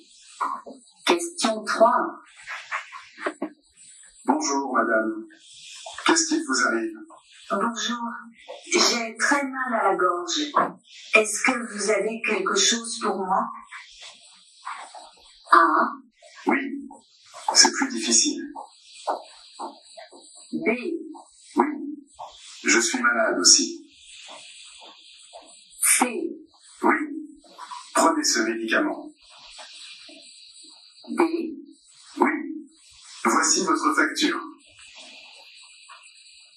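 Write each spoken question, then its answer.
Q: Est-ce que vous avez quelque chose pour moi ?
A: C: Oui, prenez ce médicament.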